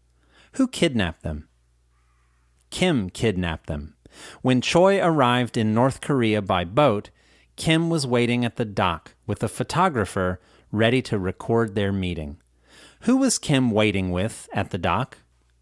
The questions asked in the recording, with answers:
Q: Who was Kim waiting with at the dock?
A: Kim was waiting with a photographer at the dock.